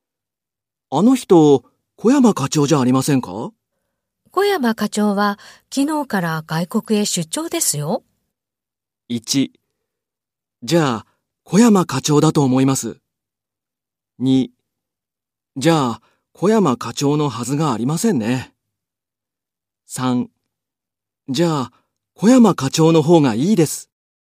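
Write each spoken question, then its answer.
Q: あの人、小山課長じゃありませんか?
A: 3: じゃあ、小山課長のはずがありませんね。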